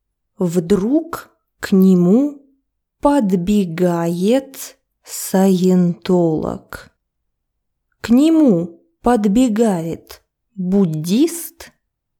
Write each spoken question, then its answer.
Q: К нему подбегает буддист?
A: Нет, к нему подбегает саентолог.